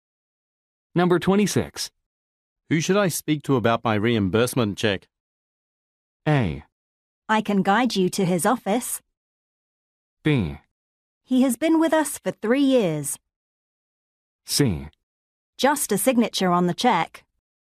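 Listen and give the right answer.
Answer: A: I can guide you to his office.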